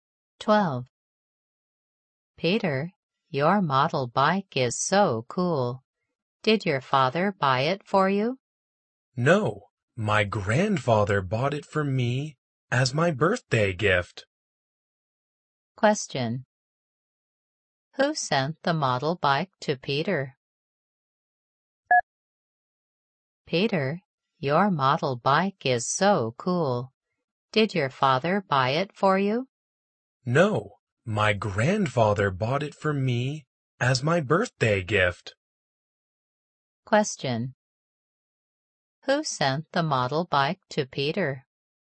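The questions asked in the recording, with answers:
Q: Who sent the model bike to Peter?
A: His grandfather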